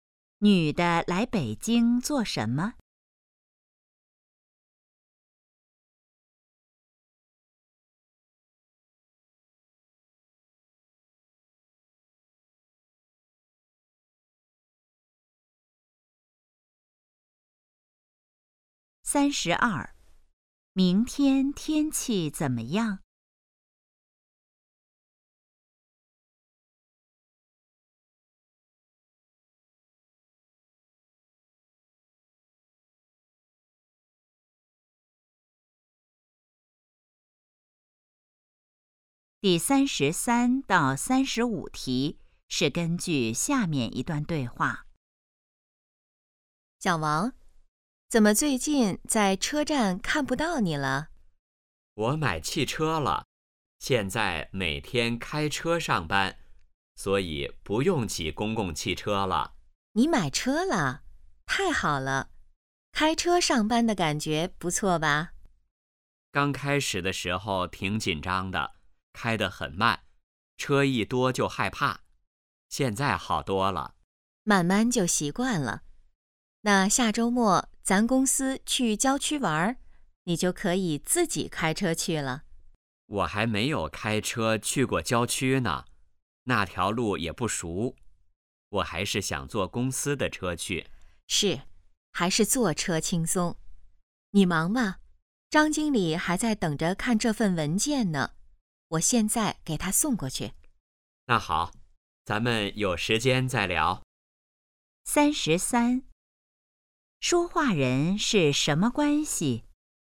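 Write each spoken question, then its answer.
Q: 说话人是什么关系?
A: 同事

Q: 男的下周末要做什么?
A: 和公司去郊区玩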